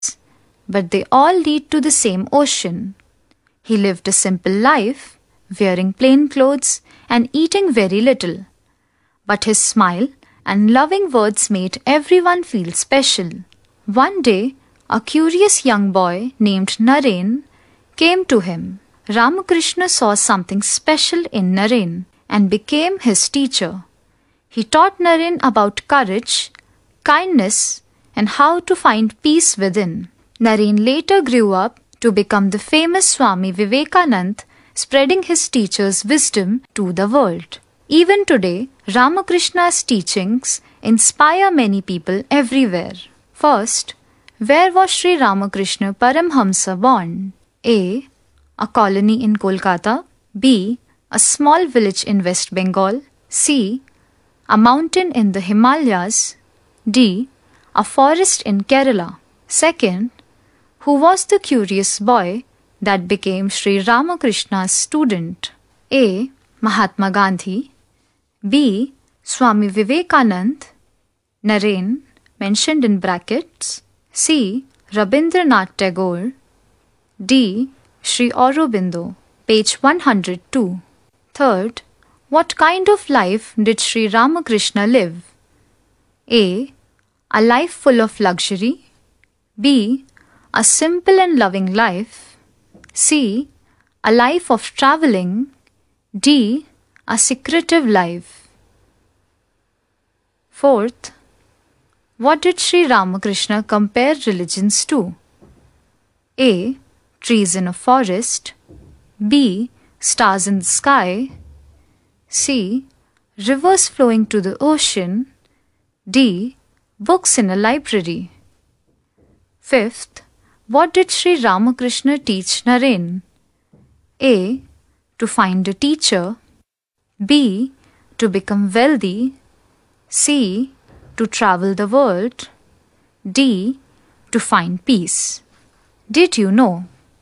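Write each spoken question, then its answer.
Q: who was the curious boy that became Sri Ramakrishna's student?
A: B: Swami Vivekanand.

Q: what kind of life did Sri Ramakrishna live?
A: B: A simple and loving life.

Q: what did Sri Ramakrishna compare religions to?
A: C: Rivers flowing to the ocean.

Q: what did Sri Ramakrishna teach Naren?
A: D: To find peace.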